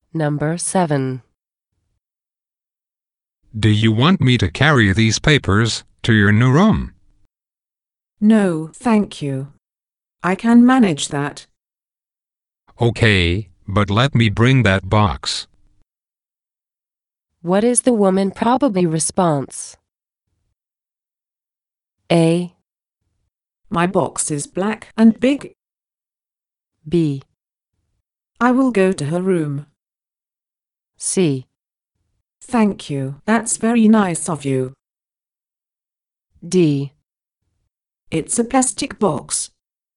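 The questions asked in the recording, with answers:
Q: What is the woman probably response?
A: C: Thank you, that's very nice of you.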